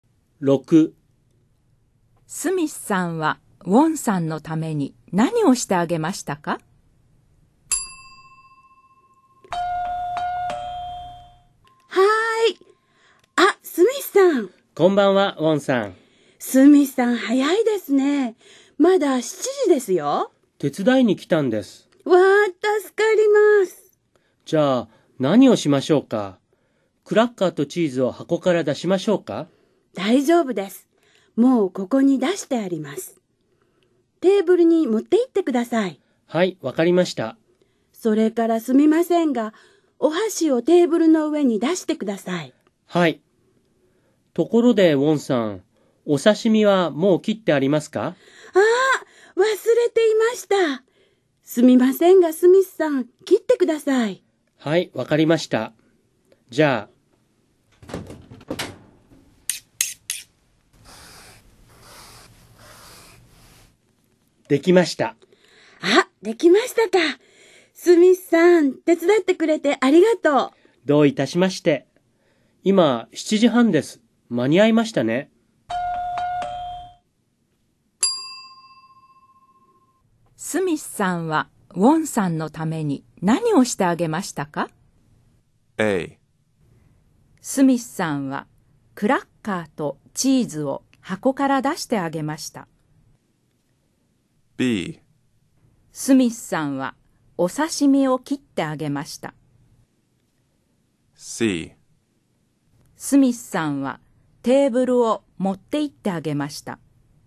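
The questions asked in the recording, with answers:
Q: スミスさんは、ウォンさんのために何をしてあげましたか?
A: B: スミスさんは、お刺身を切ってあげました。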